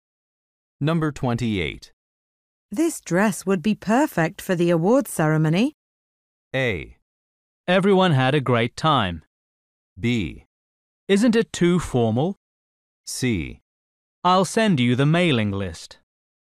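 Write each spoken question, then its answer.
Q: This dress would be perfect for the awards ceremony.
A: B: Isn't it too formal?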